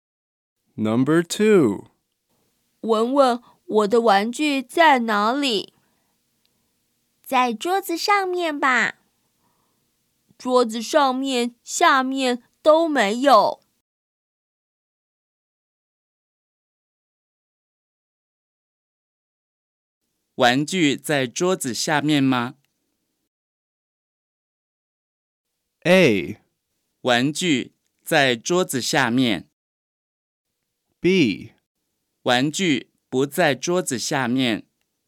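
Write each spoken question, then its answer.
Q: 玩具在桌子下面吗?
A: B: 玩具不在桌子下面。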